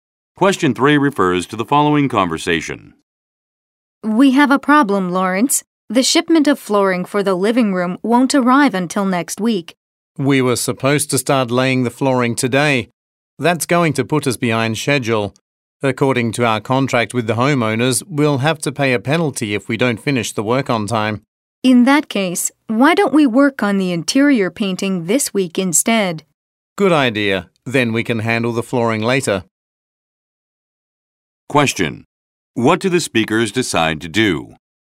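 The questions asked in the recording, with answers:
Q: What do the speakers decide to do?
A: Work on the interior painting this week instead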